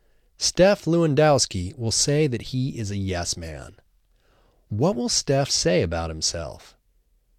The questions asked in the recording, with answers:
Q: What will Steph say about himself?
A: Steph will say that he is a yes man.